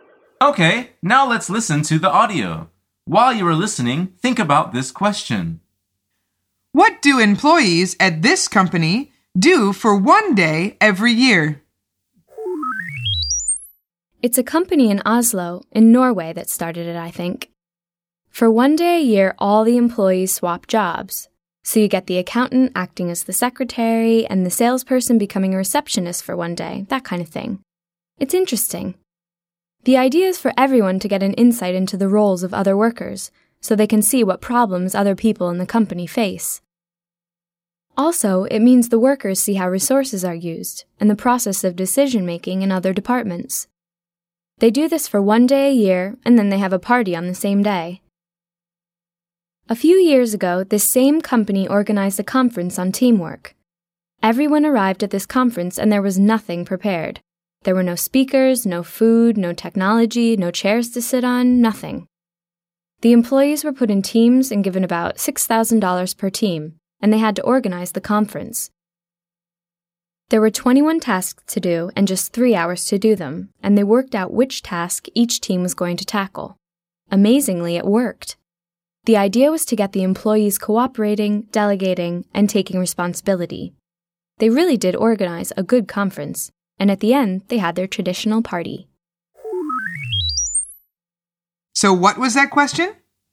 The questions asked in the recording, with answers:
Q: What do employees at this company do for one day every year?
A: The answer is they swap jobs.